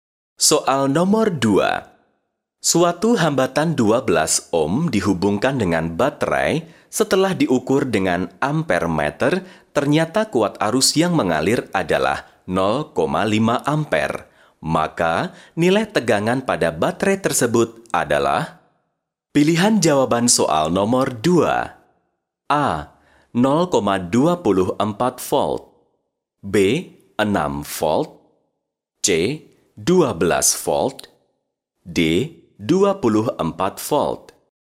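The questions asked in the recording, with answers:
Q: Maka, nilai tegangan pada baterai tersebut adalah?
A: B: 6 volt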